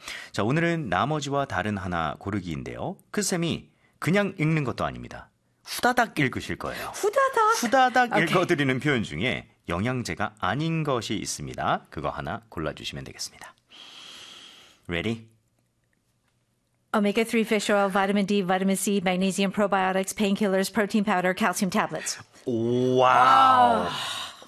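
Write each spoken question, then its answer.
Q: 읽어드리는 표현 중에 영양제가 아닌 것이 있습니다.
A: painkillers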